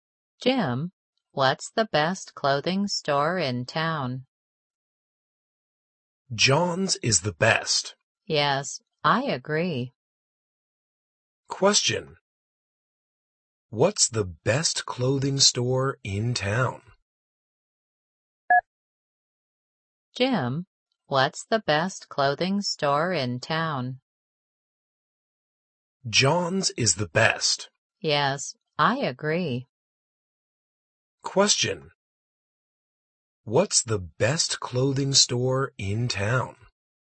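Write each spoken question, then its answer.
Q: What's the best clothing store in town?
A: John's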